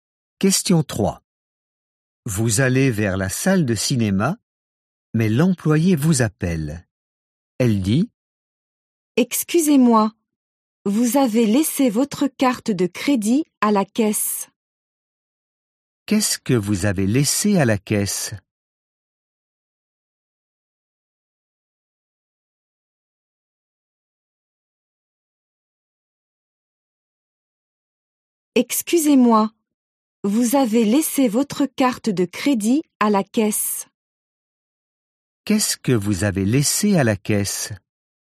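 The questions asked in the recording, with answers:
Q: Qu'est-ce que vous avez laissé à la caisse ?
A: Votre carte de crédit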